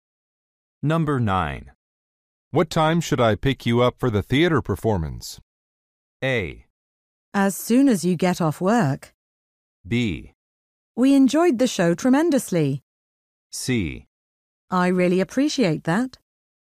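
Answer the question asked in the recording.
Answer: A: As soon as you get off work.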